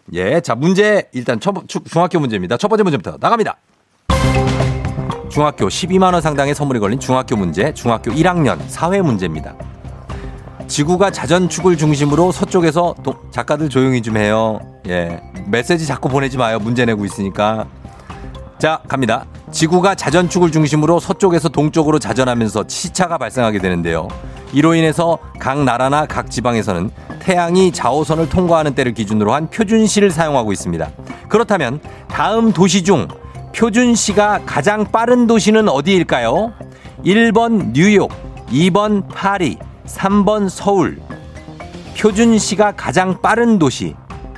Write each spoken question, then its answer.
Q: 그렇다면 다음 도시 중 표준시가 가장 빠른 도시는 어디일까요?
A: 정답은 3번 서울입니다.